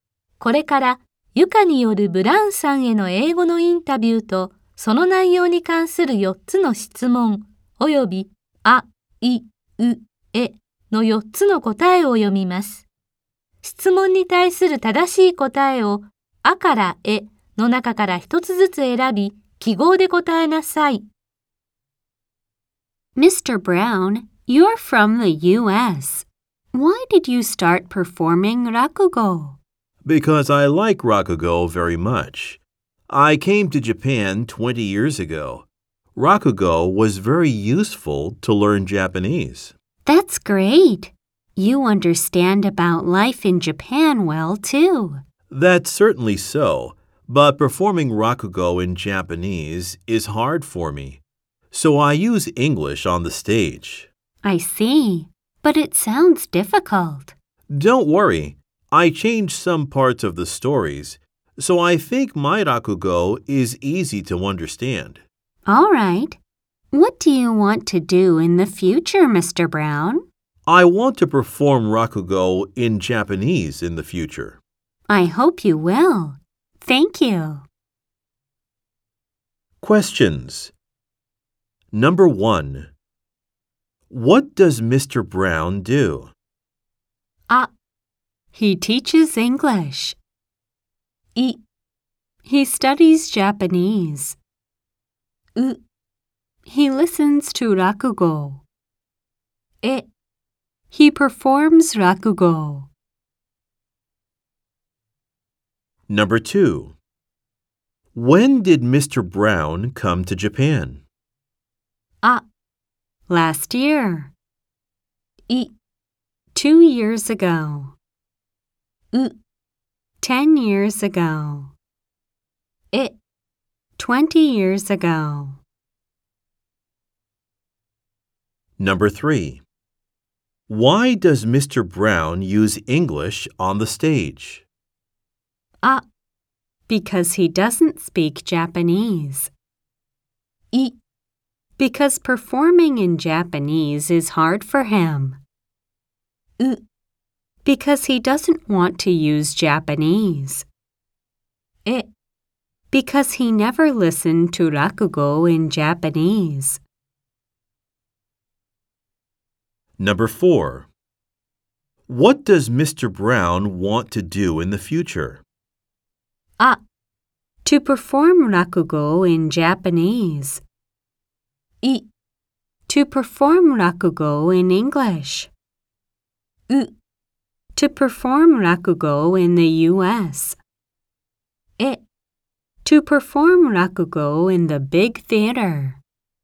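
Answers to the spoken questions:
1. え: he performs rakugo.
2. え: 20 years ago.
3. い: Because performing in Japanese is hard for him.
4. あ: To perform rakugo in Japanese.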